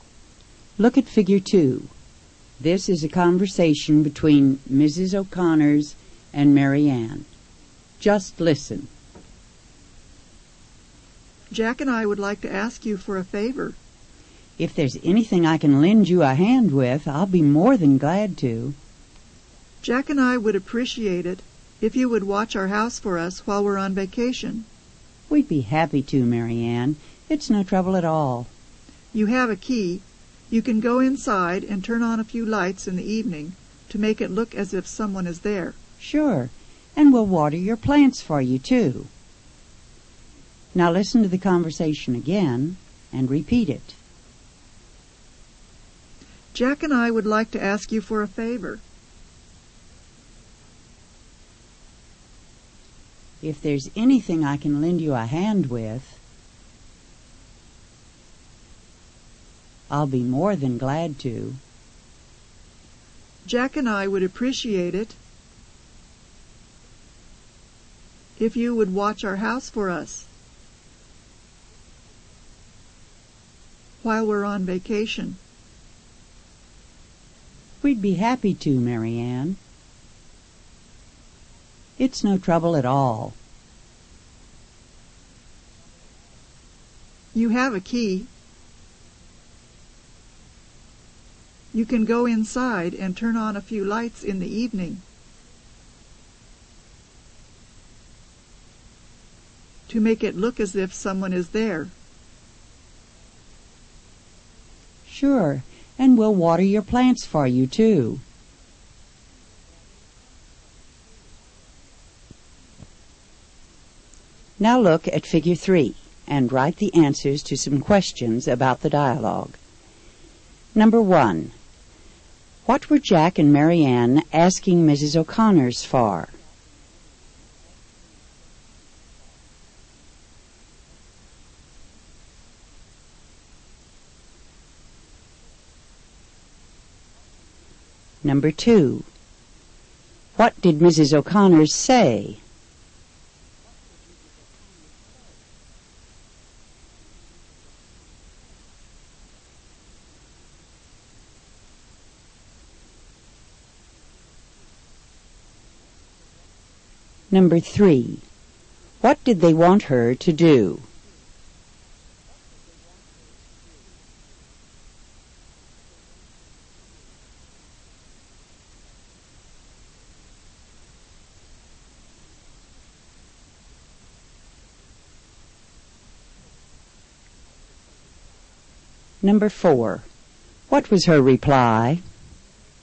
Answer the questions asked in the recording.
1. Jack and Marianne asked Mrs.
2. If there was anything she could lend them a hand with, she'd be more than glad to.
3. They wanted her to watch their house for them while they were on vacation.
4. We'd be happy to, Marianne.